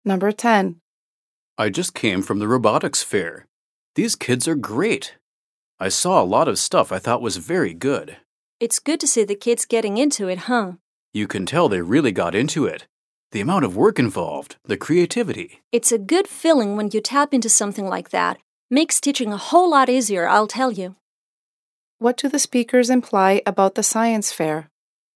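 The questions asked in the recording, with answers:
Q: What do the speakers imply about the science fair?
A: The students were very engaged and put a lot of work and creativity into their projects.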